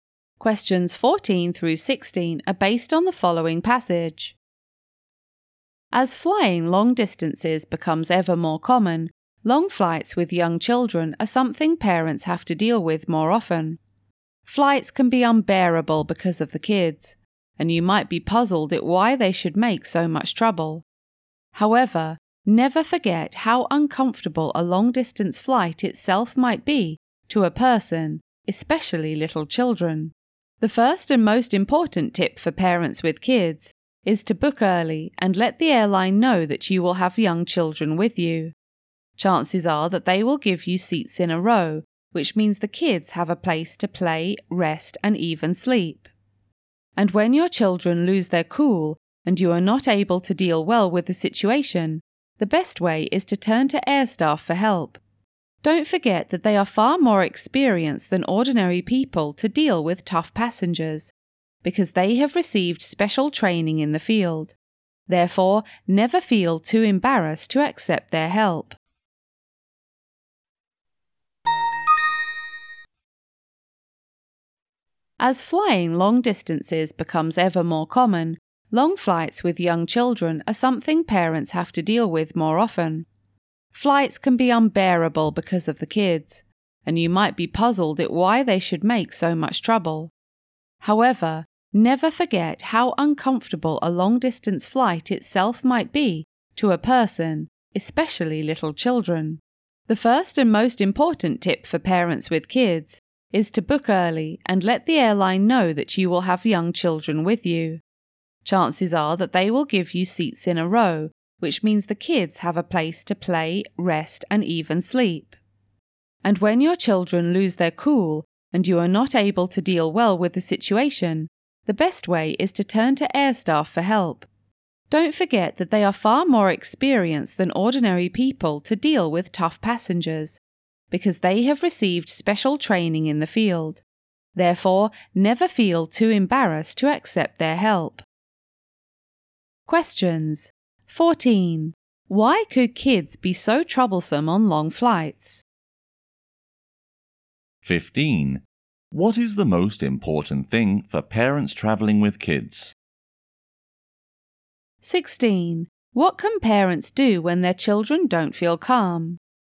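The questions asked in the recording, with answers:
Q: Why could kids be so troublesome on long flights?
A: Long-distance flights are uncomfortable for them

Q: What is the most important thing for parents traveling with kids?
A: Book early and tell the airline they will have young children

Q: What can parents do when their children don't feel calm?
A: Turn to the air staff for help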